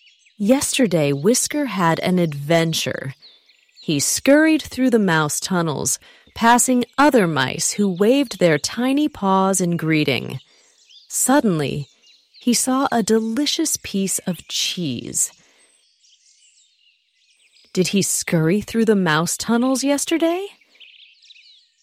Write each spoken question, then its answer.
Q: Did he scurry through the mouse tunnels yesterday?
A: Yes, he did. Yesterday, he scurried through the mouse tunnels.